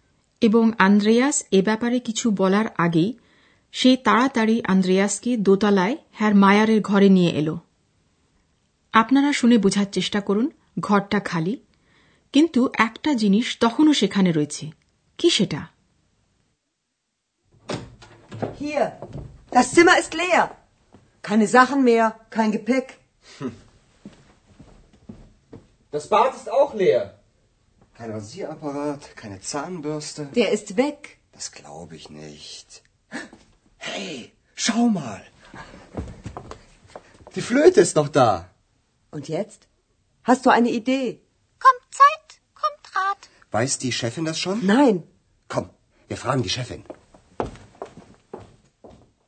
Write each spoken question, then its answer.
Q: আপনারা শুনে বোঝার চেষ্টা করুন ঘরটা খালি কিন্তু একটা জিনিস তখনও সেখানে রয়েছে কি সেটা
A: একমাত্র জিনিস যা খালি ঘরটাতে রয়েছে তা হল হ্যার মায়ারের বাসিটা